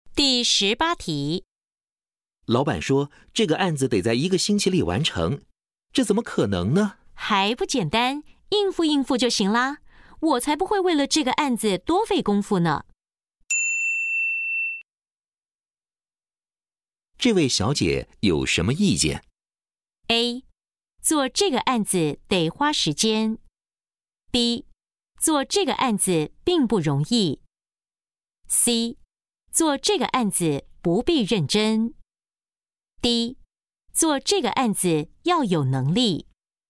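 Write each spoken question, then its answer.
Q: 这位小姐有什么意见?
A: C: 做这个案子不必认真。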